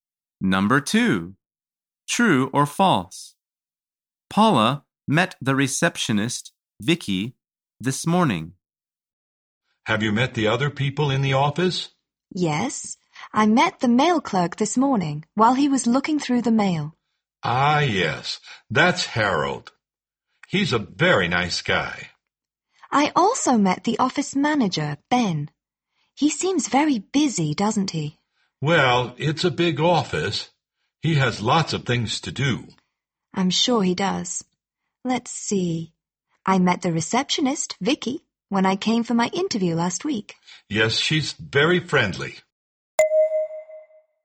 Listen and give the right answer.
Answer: The answer is false.